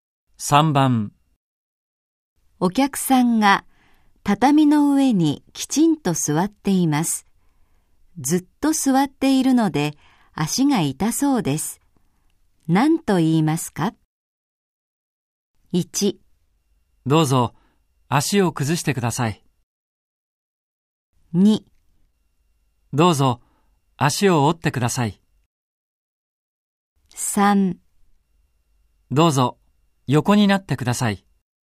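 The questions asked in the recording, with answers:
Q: 何と言いますか?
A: 1: どうぞ足を崩してください。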